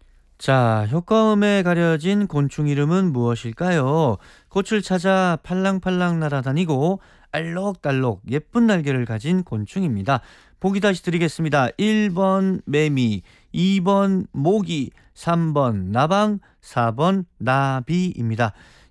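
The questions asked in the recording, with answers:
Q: 자, 효과음에 가려진 곤충 이름은 무엇일까요?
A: 4: 나비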